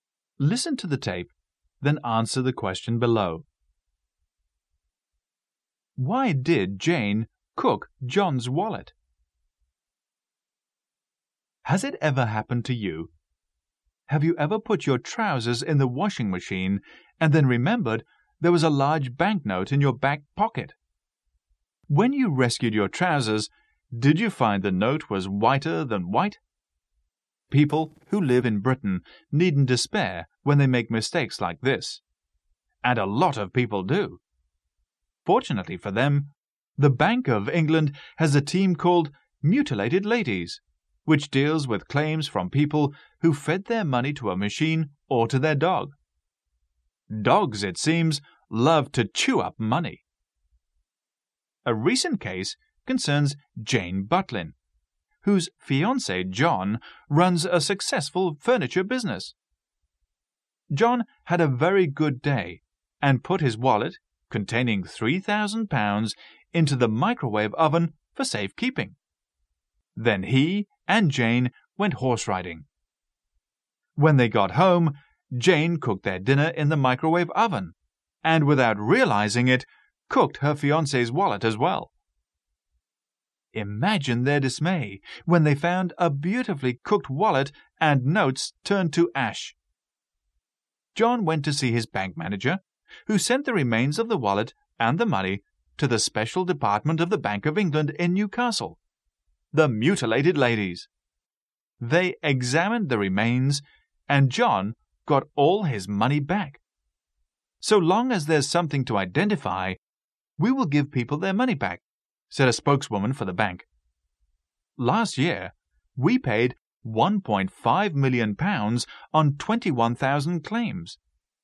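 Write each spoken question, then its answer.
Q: Why did Jane cook John's wallet?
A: She didn't know it was in the microwave oven, where John had put it for safekeeping.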